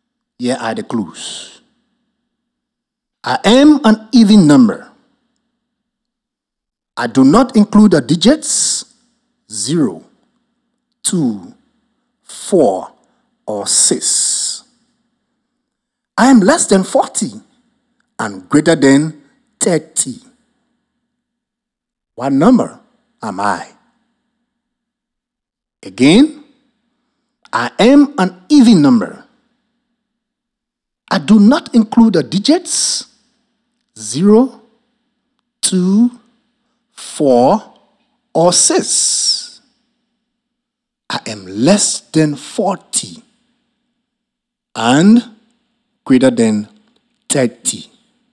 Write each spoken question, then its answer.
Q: What number am I?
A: So the measuring number is 38.